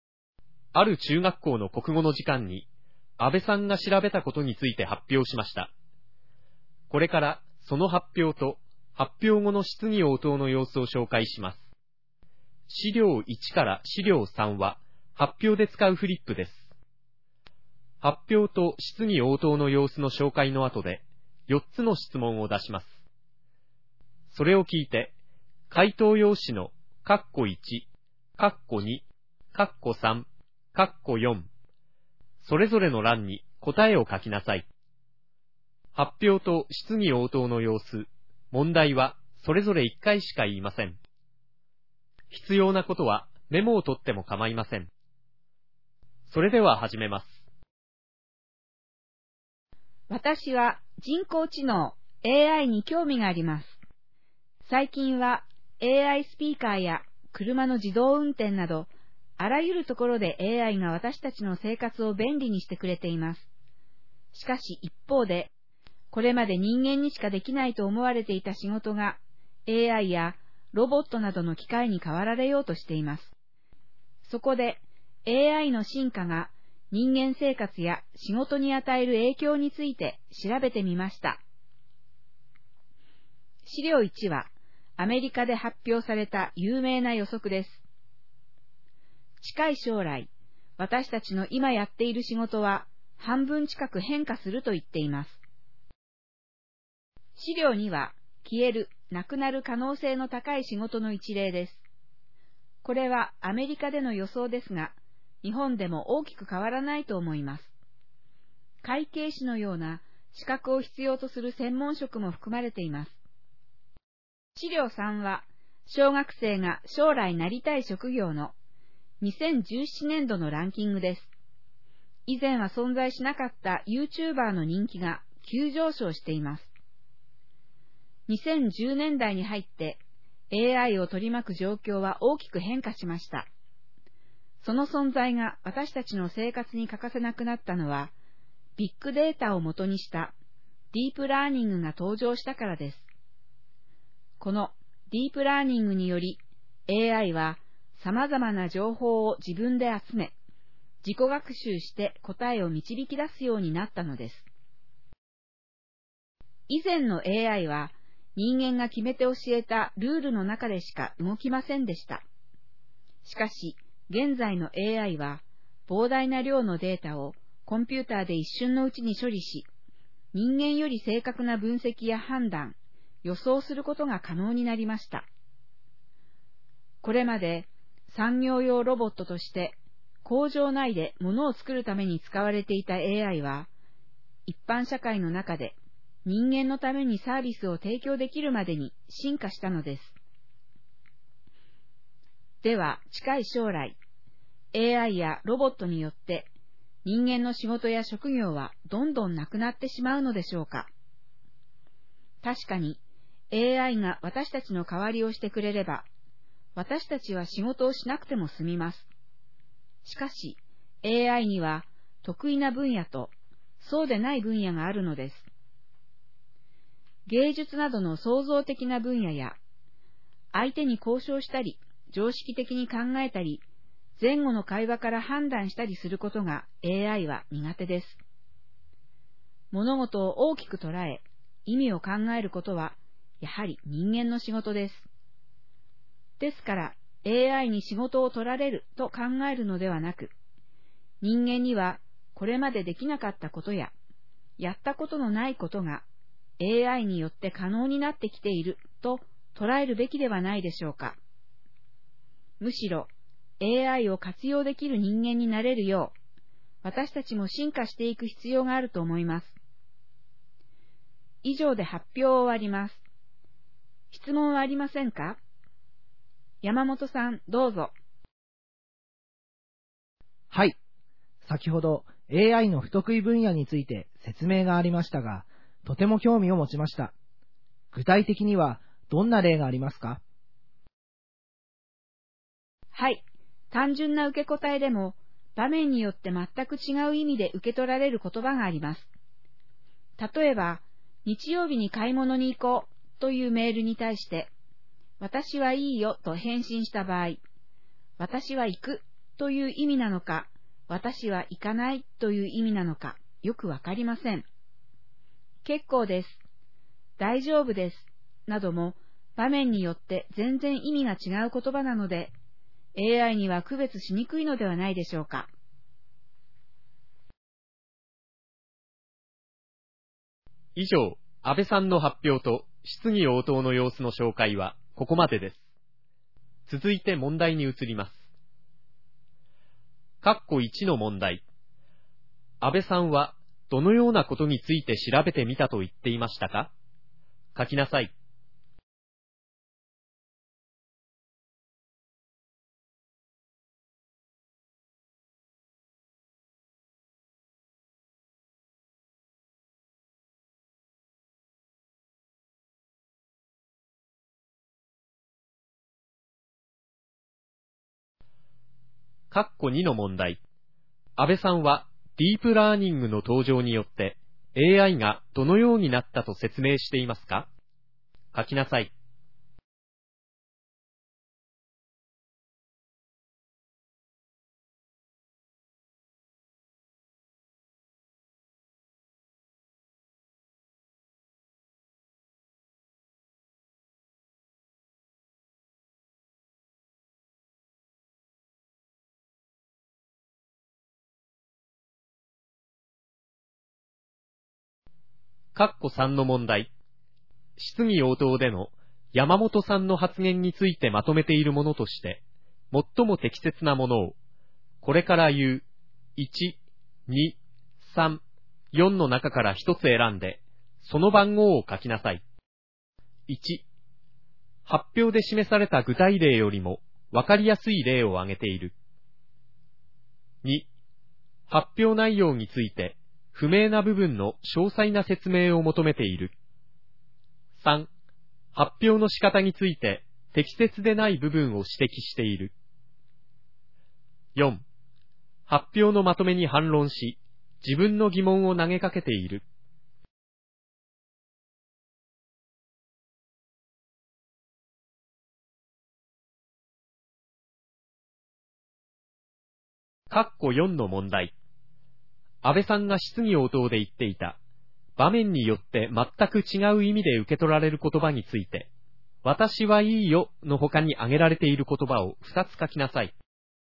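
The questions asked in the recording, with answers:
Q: 安倍さんはどのようなことについて調べてみたと言っていましたか?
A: AIの進化が人間生活や仕事に与える影響

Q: 安倍さんはディープラーニングの登場によって AI がどのようになったと説明していますか?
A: 様々な情報を自分で集め、自己学習して答えを導き出すようになった

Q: 質疑応答での山本さんの発言についてまとめているものとして、最も適切なものを、これから言う1、2、3、4の中から一つ選んで、その番号を書きなさい。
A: 2: 発表内容について、不明な部分の詳細な説明を求めている。

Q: 安倍さんが質疑応答で言っていた、場面によって全く違う意味で受け取られる言葉について、私はいいよの他に挙げられている言葉を2つ書きなさい。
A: 結構です、大丈夫です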